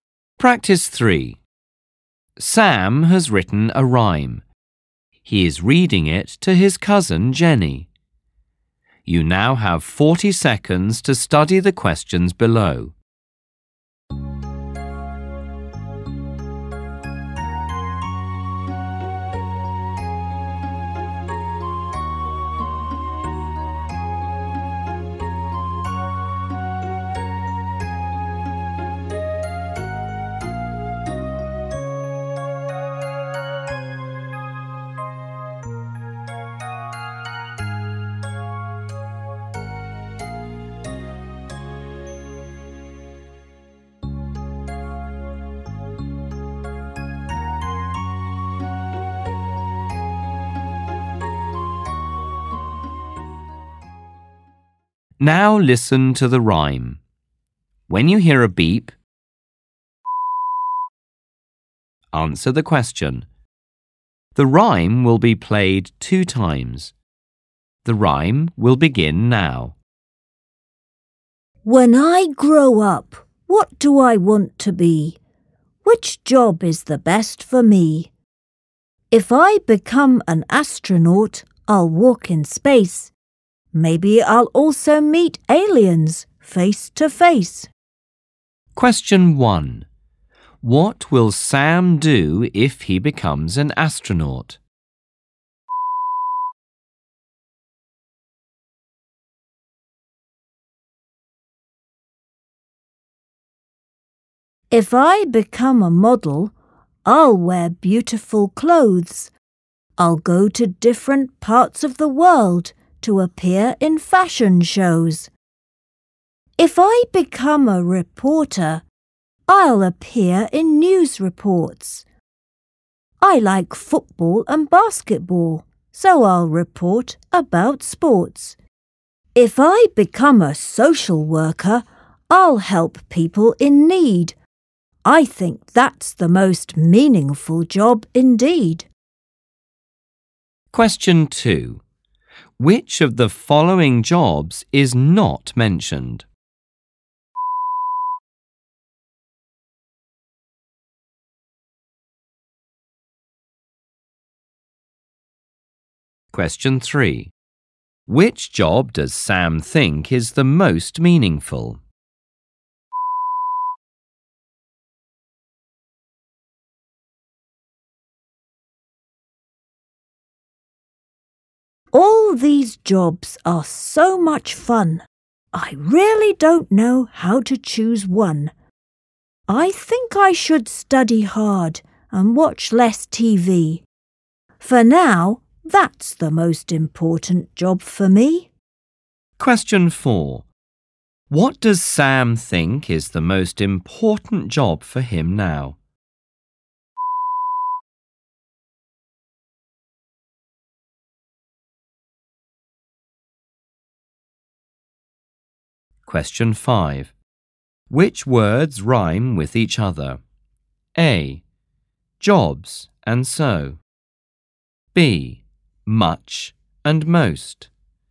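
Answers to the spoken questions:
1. Walk in space and maybe meet aliens
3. Social worker
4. Study hard and watch less TV
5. C: Fun and one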